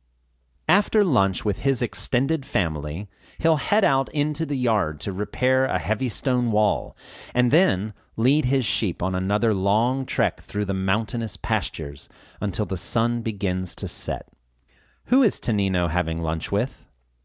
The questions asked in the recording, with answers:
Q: Who is Tonino having lunch with?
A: He's having lunch with his extended family.